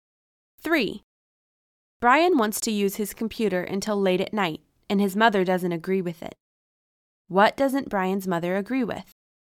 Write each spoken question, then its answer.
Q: What doesn't Brian's mother agree with?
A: She doesn't agree with Brian's using his computer until late at night.